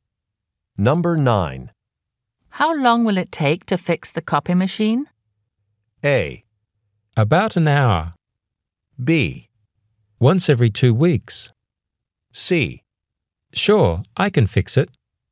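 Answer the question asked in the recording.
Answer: A: About an hour.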